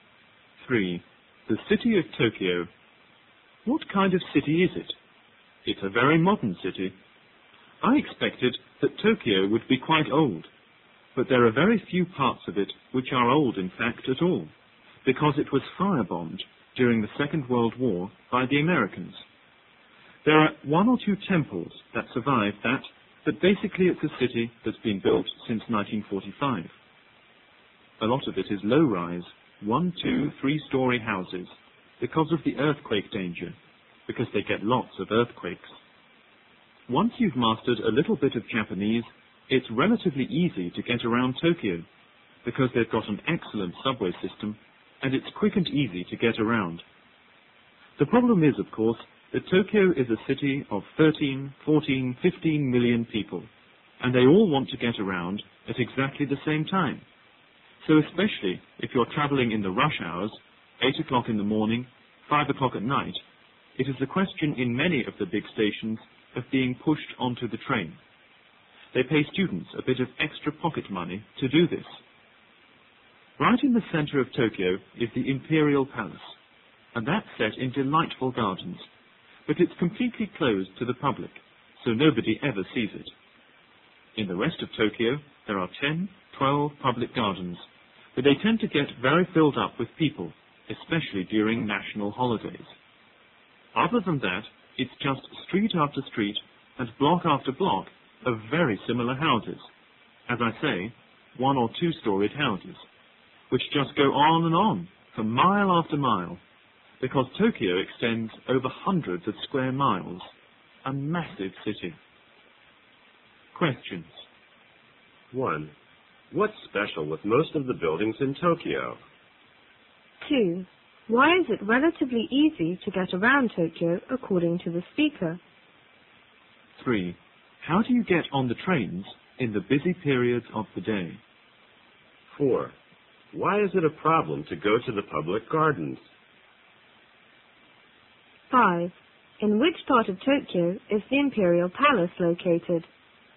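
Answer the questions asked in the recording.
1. They are modern and low-rise (one to three storeys), built since 1945
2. It has an excellent subway system
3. You are pushed onto the train
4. They get very crowded, especially on national holidays
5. Right in the center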